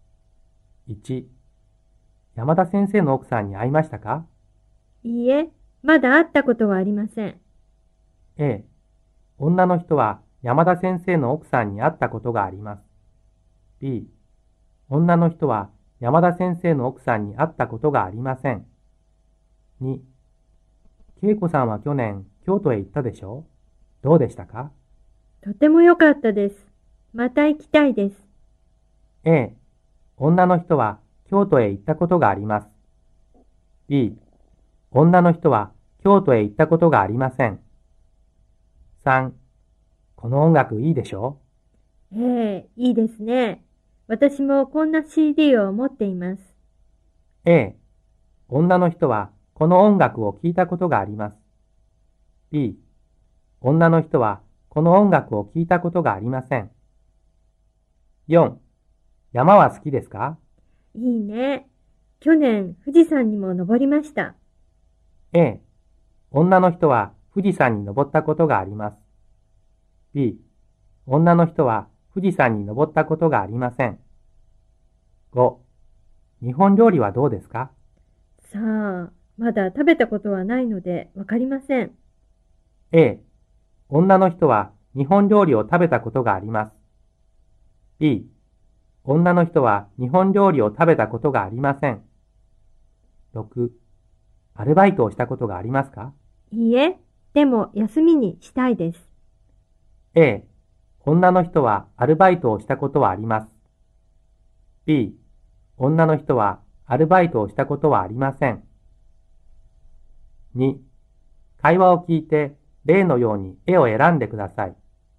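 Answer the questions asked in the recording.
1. B: 女の人は山田先生の奥さんに会ったことがありません。
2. A: 女の人は京都へ行ったことがあります。
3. A: 女の人はこの音楽を聴いたことがあります。
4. A: 女の人は富士山に登ったことがあります。
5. B: 女の人は日本料理を食べたことがありません。
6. B: 女の人はアルバイトをしたことはありません。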